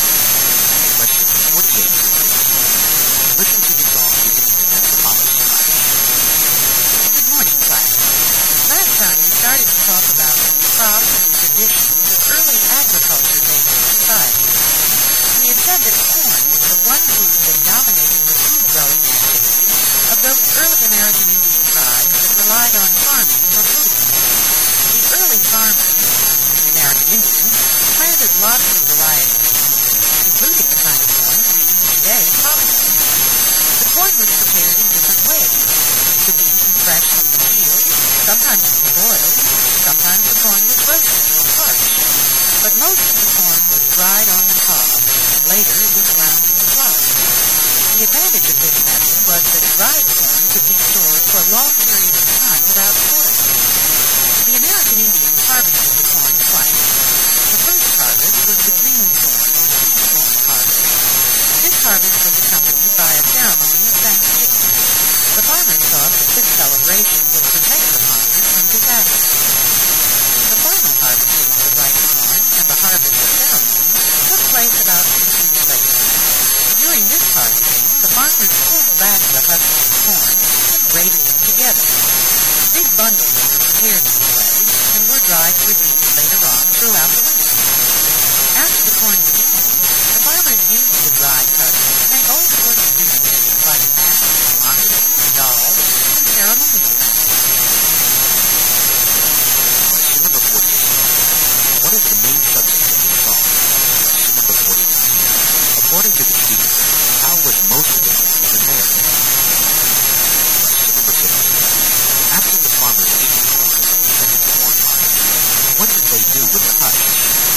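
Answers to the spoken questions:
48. Corn in early American Indian farming
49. Dried on the cob, then ground into flour
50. Made things such as masks, moccasins and dolls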